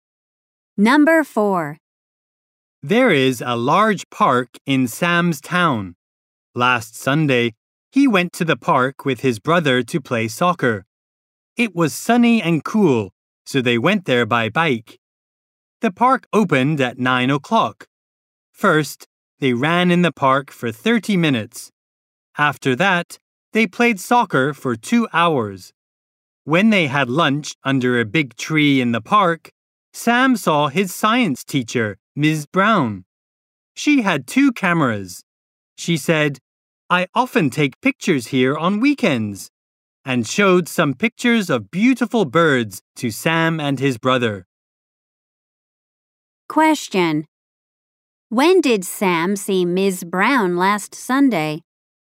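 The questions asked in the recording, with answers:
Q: When did Sam see Ms. Brown last Sunday?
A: When he and his brother had lunch in the park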